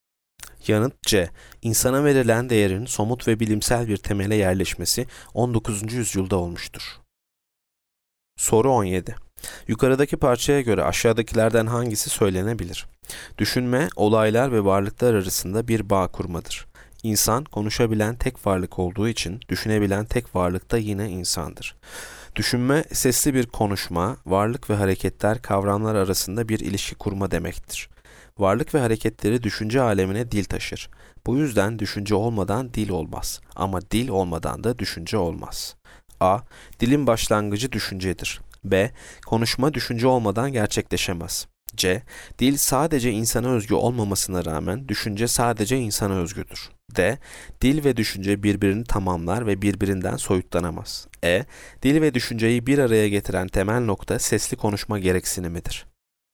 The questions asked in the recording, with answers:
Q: Yukarıdaki parçaya göre aşağıdakilerden hangisi söylenebilir?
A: Yanıt D. Dil ve düşünce birbirini tamamlar ve birbirinden soyutlanamaz.